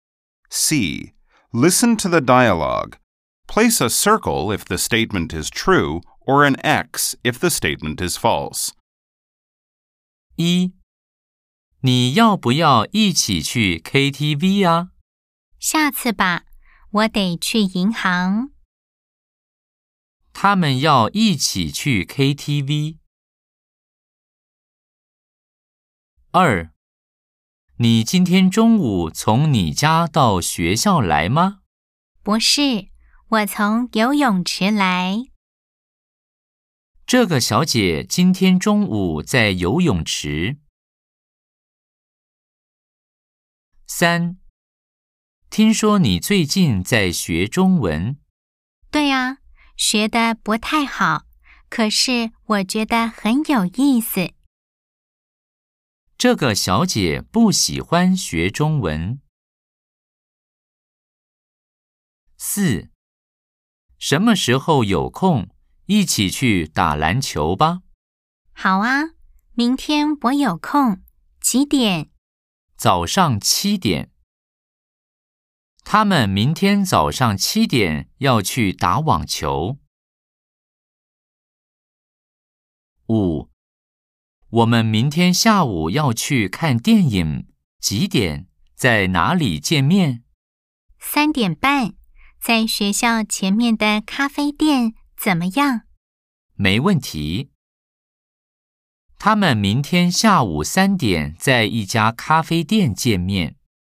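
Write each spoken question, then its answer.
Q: 他们要一起去 KTV。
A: 错 (X)

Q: 这个小姐今天中午在游泳池。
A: 对 (O)

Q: 这个小姐不喜欢学中文。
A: 错 (X)

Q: 他们明天早上七点要去打网球。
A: 错 (X)

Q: 他们明天下午三点在一家咖啡店见面。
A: 错 (X)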